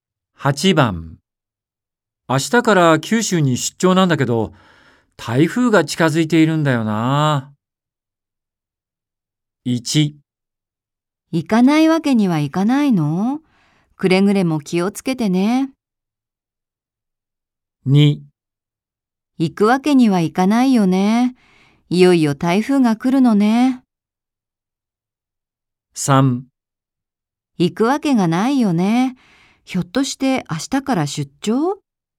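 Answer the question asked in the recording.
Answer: 1: 行かないわけにはいかないの?くれぐれも気をつけてね。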